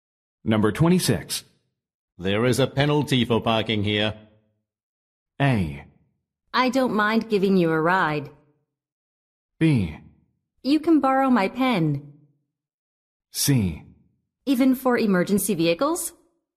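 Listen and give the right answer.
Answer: C: Even for emergency vehicles?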